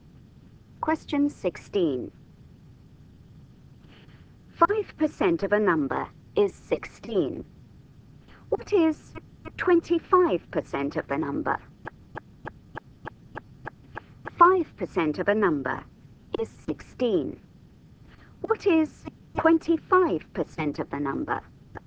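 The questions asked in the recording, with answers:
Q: 5% of a number is 16. What is 25% of the number?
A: 80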